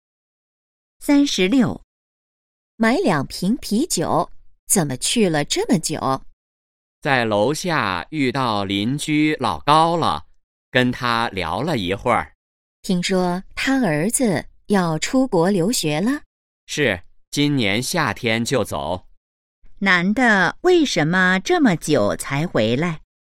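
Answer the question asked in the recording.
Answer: 在楼下遇到邻居老高,跟他聊了一会儿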